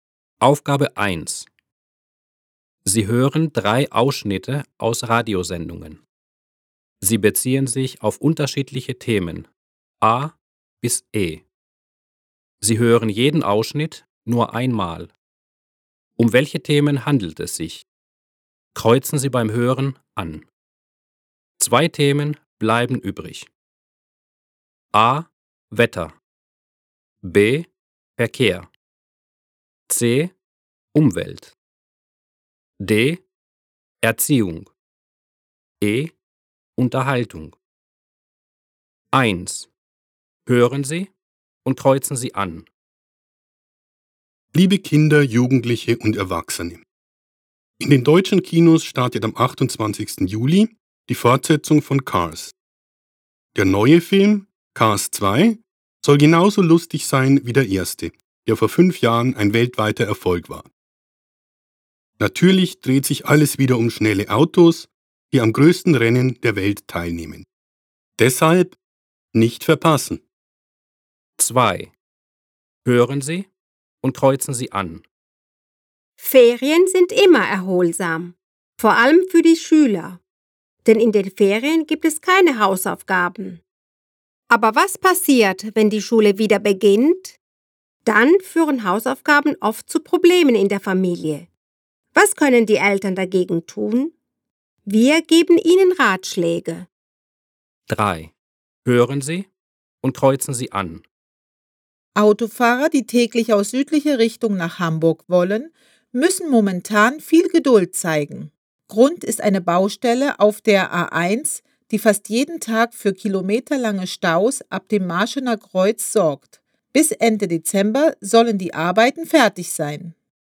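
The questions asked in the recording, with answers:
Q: Um welche Themen handelt es sich?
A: E: Unterhaltung

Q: Um welche Themen handelt es sich?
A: D: Erziehung

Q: Um welche Themen handelt es sich?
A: B: Verkehr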